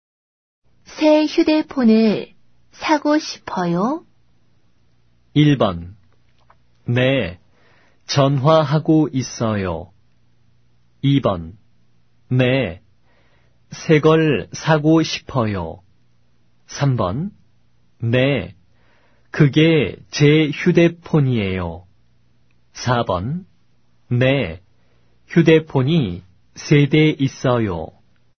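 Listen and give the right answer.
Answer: 2: 네, 새 걸 사고 싶어요.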